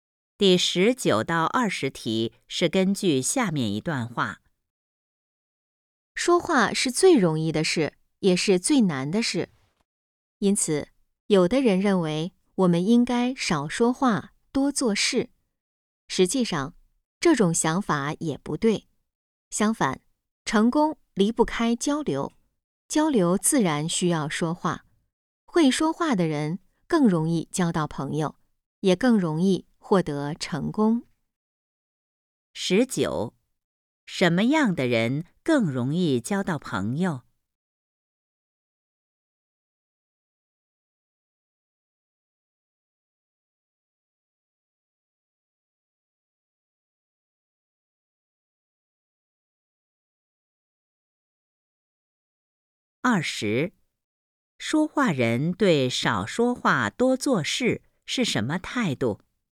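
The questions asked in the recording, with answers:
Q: 什么样的人更容易交到朋友?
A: 会说话的人

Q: 说话人对少说话多做事是什么态度?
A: 不同意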